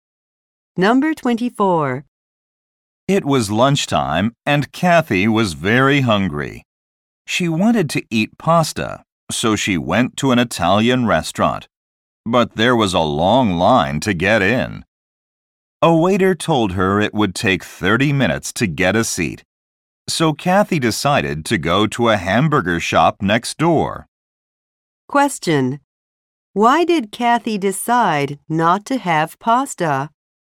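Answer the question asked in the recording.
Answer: There was a long line at the Italian restaurant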